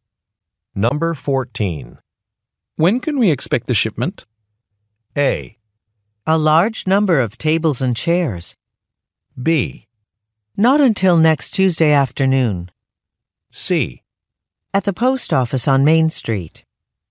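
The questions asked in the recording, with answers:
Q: When can we expect the shipment?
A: B: Not until next Tuesday afternoon.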